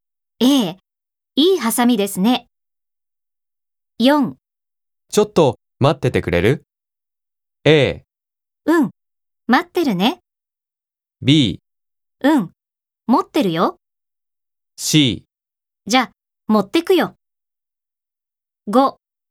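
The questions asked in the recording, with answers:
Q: ちょっと待っててくれる?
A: A: うん、待ってるね。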